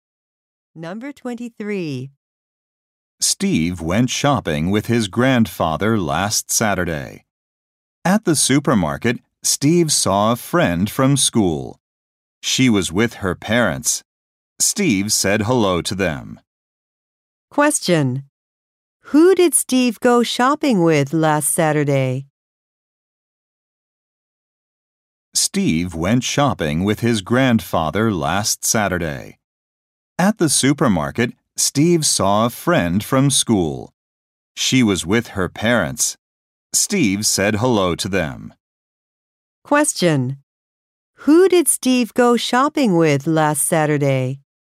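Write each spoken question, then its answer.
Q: Who did Steve go shopping with last Saturday?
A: His grandfather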